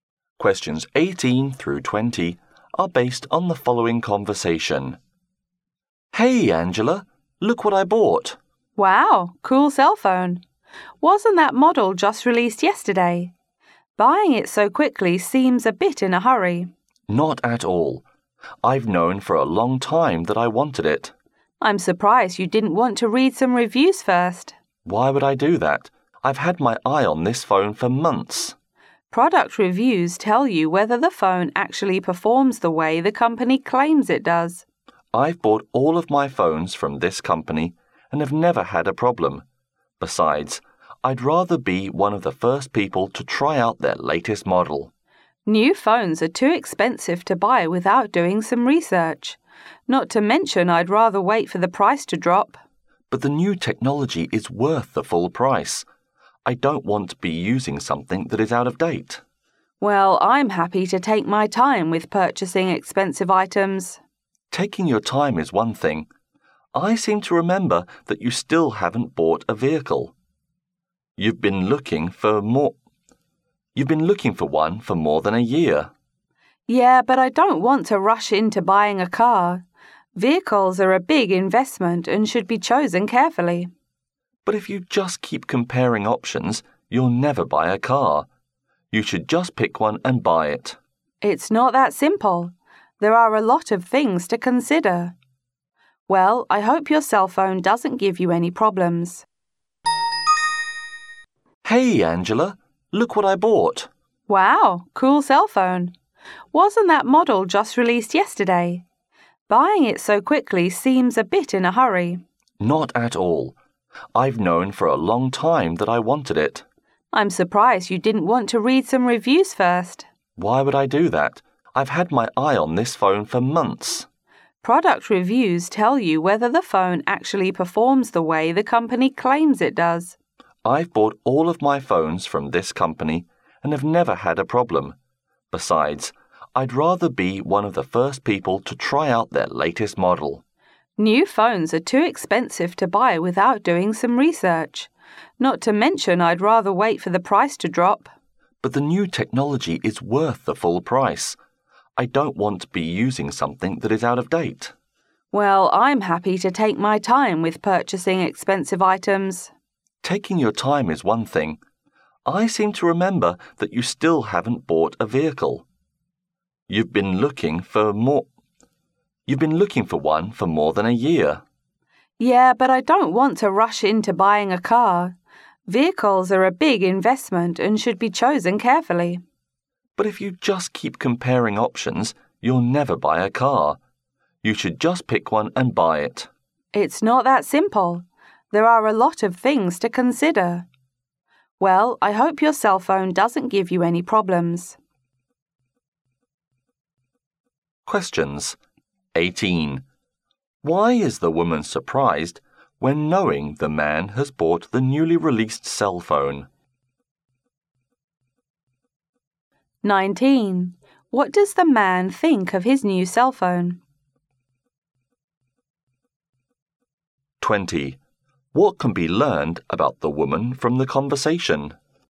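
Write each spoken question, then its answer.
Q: Why is the woman surprised when knowing the man has bought the newly released cell phone?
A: He didn't read any reviews first

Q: What does the man think of his new cell phone?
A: Its new technology is worth the full price

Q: What can be learned about the woman from the conversation?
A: She takes her time with expensive purchases; she still hasn't bought a car after over a year of looking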